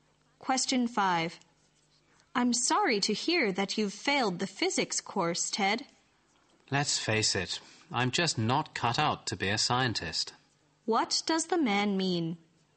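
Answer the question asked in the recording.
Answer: He is not suited to being a scientist.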